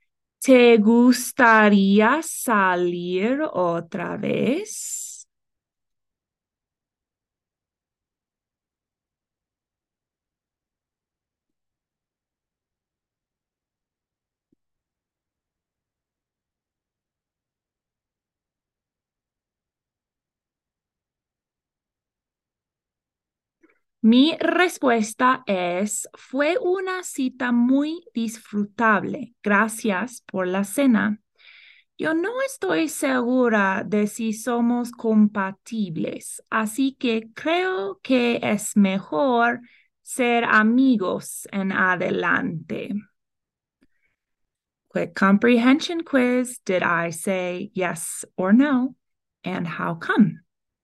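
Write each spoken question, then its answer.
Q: Did I say yes or no? And how come?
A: No; she isn't sure they're compatible, so she thinks it's better to be friends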